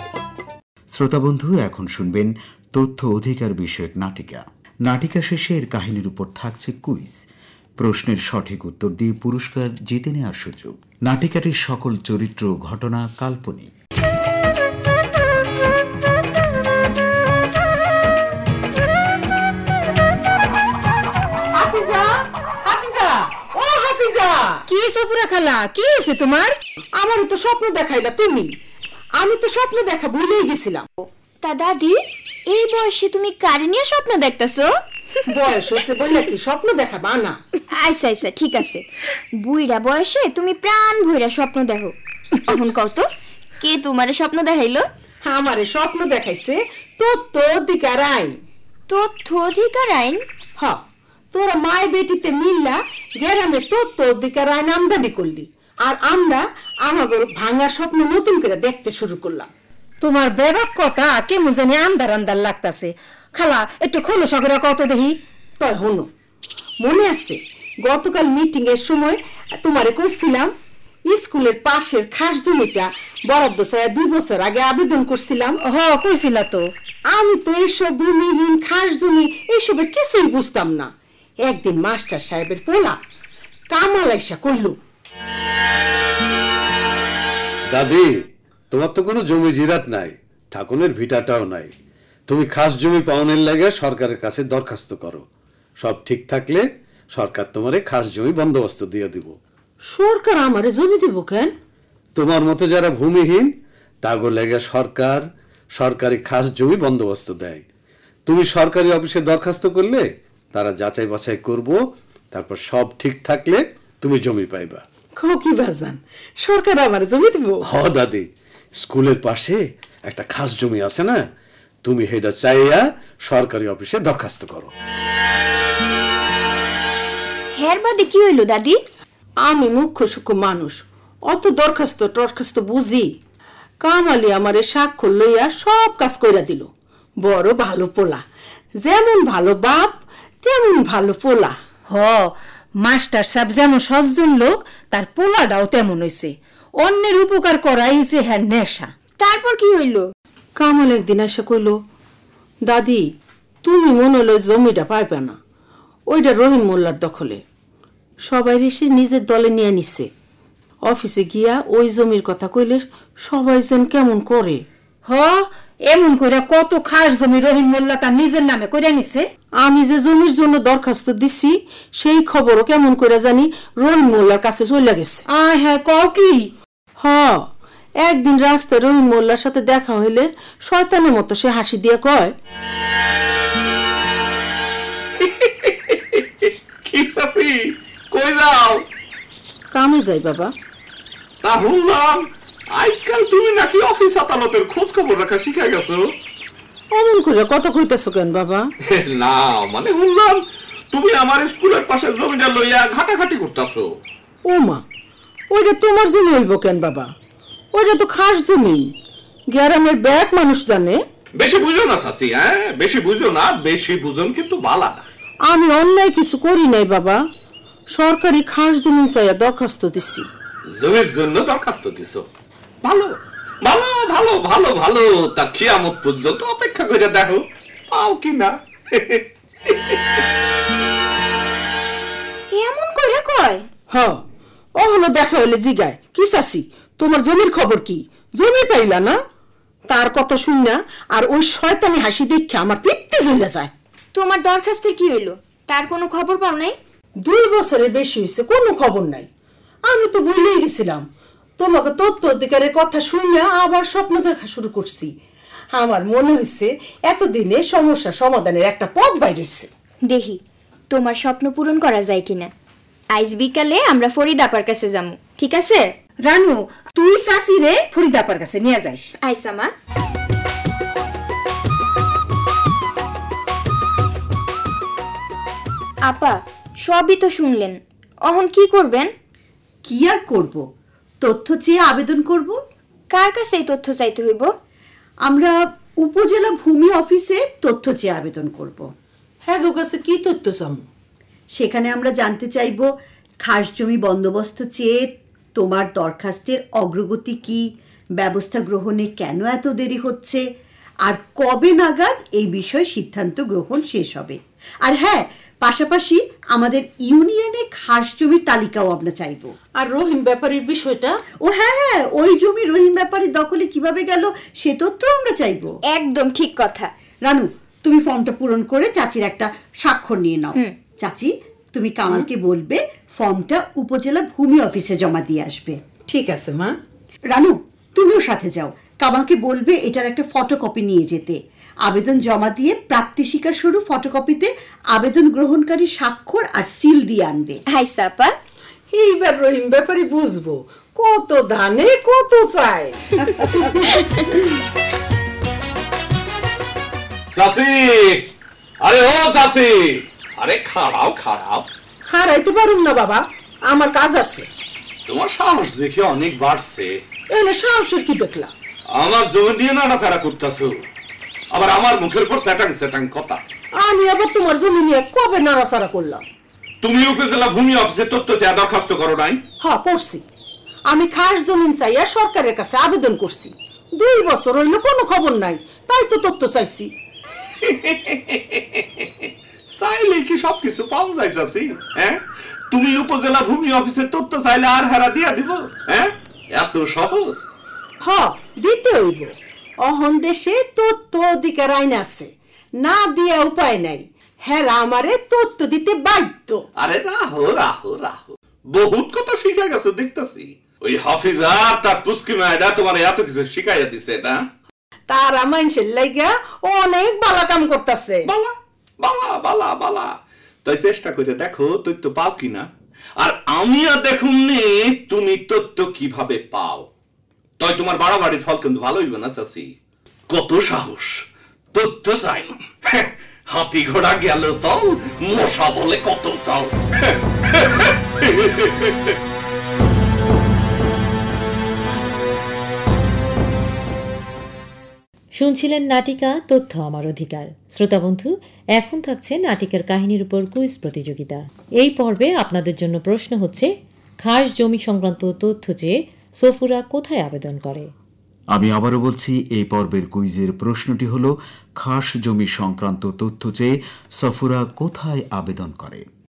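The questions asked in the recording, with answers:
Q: খাস জমি সংক্রান্ত তথ্য চেয়ে সফুরা কোথায় আবেদন করে?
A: উপজেলা ভূমি অফিসে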